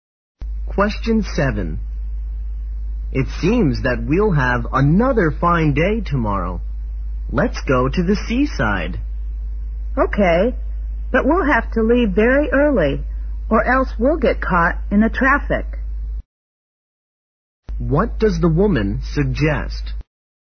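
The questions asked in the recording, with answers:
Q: What does the woman suggest?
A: Leaving very early to avoid the traffic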